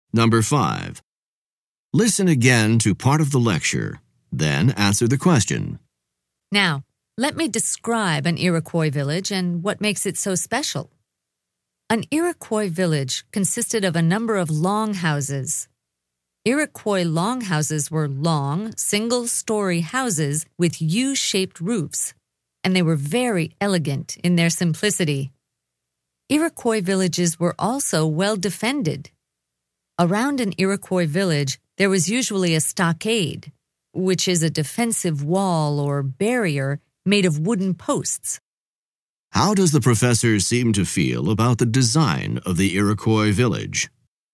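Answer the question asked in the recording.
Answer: He admires it; he finds the longhouses elegant in their simplicity.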